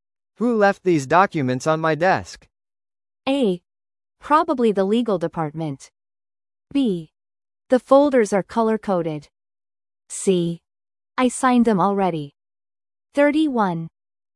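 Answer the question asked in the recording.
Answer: A: Probably the legal department.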